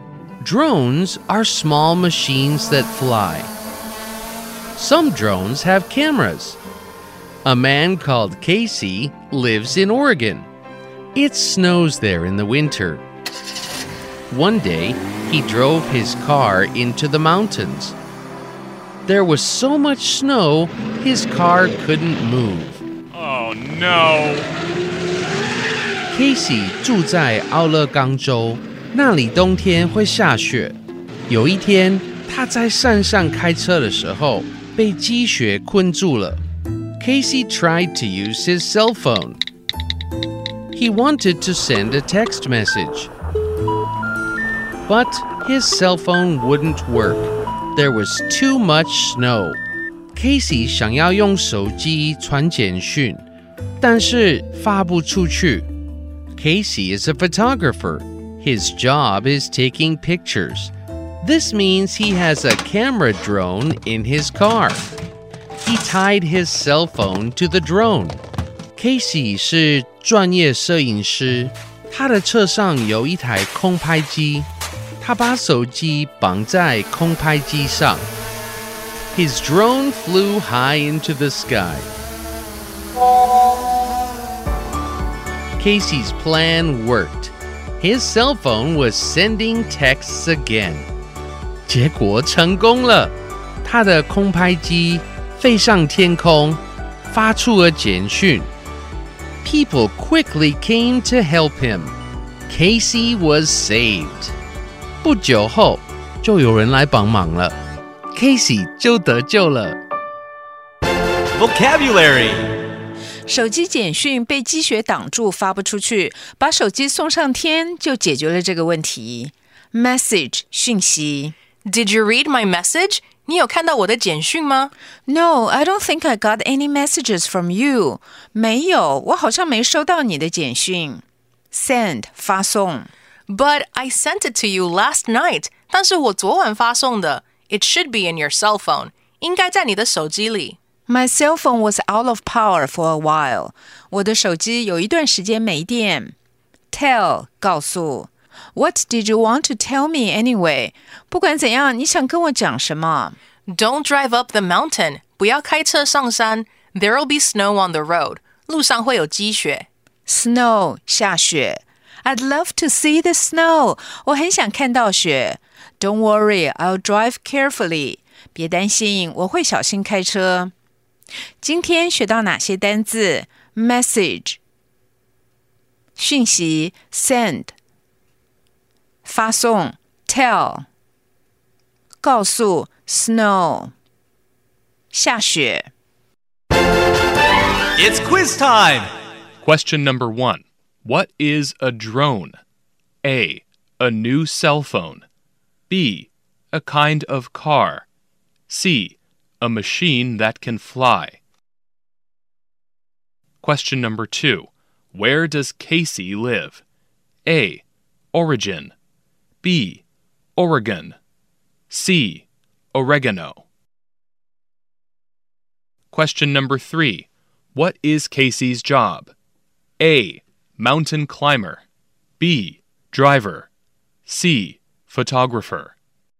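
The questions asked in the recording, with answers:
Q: What is a drone?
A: C: A machine that can fly.

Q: Where does Casey live?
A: B: Oregon.

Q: What is Casey's job?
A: C: Photographer.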